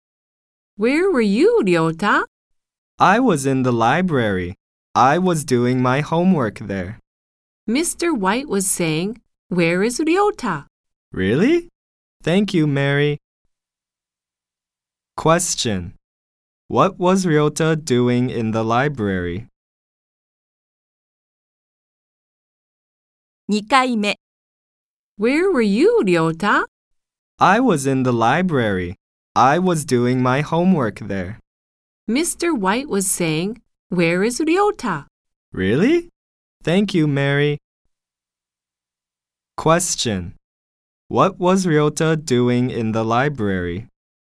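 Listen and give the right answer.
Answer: He was doing his homework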